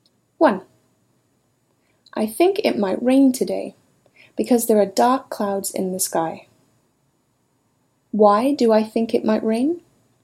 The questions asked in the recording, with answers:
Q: Why do I think it might rain?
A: You think it might rain because there are dark clouds in the sky.